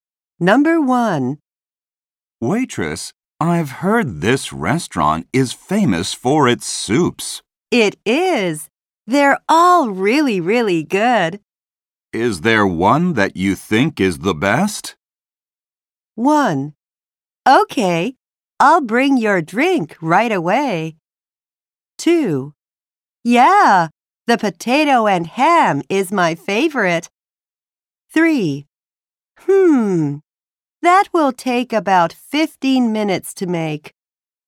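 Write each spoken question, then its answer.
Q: Is there one that you think is the best?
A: 2: Yeah, the potato and ham is my favorite.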